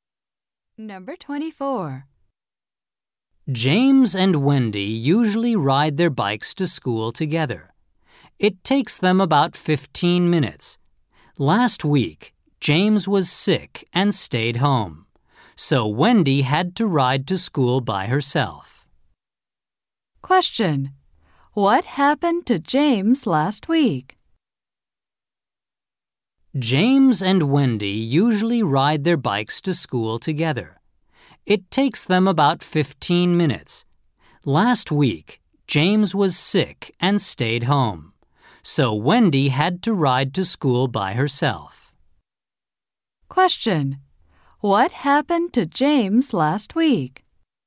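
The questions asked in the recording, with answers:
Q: What happened to James last week?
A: He was sick and stayed home.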